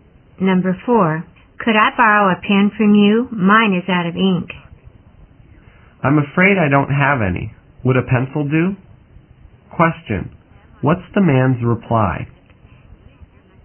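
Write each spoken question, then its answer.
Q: What's the man's reply?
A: He has no pen but offers a pencil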